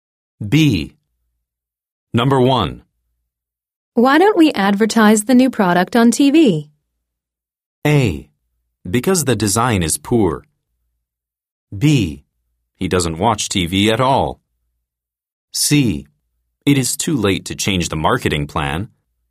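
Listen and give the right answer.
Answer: C: It is too late to change the marketing plan.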